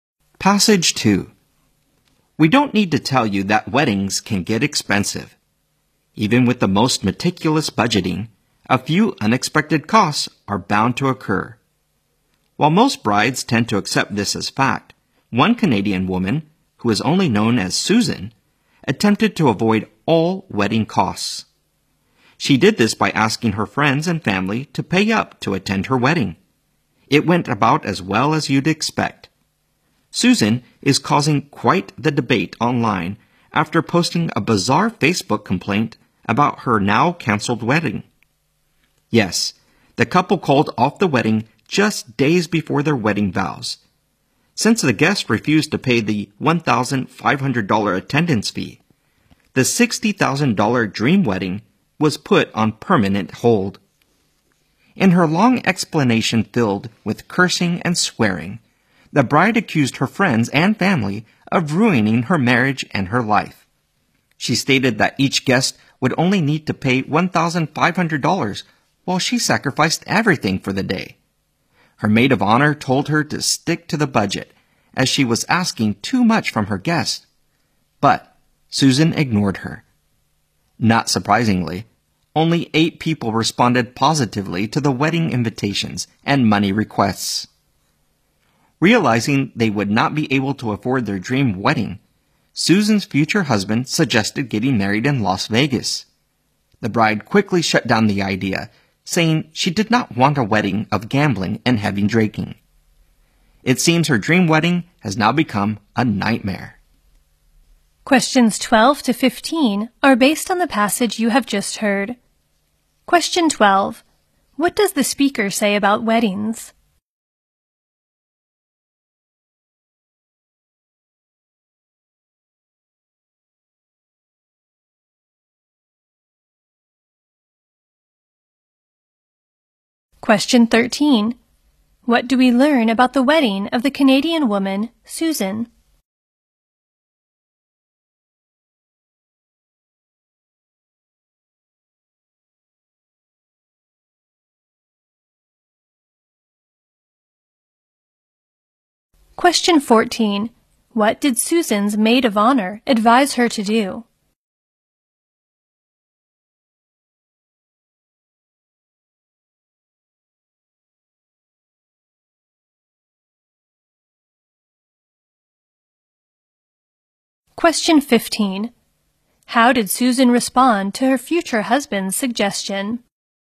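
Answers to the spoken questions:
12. They can get expensive, with unexpected costs
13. It was canceled because guests refused to pay the attendance fee
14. Stick to the budget
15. She quickly rejected the idea of marrying in Las Vegas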